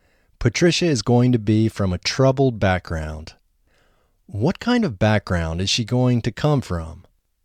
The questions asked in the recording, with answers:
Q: What kind of background is she going to come from?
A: She is going to come from a troubled background.